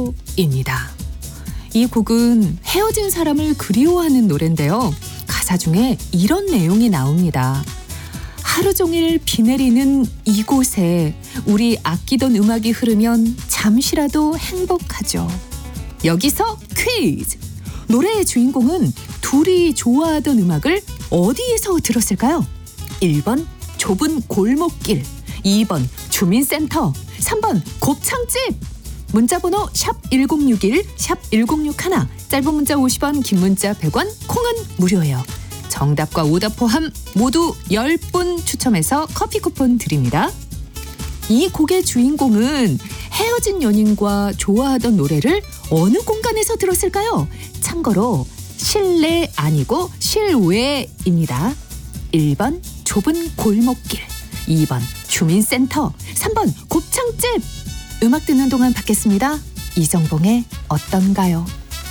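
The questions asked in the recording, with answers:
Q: 노래의 주인공은 둘이 좋아하던 음악을 어디에서 들었을까요?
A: 1번: 좁은 골목길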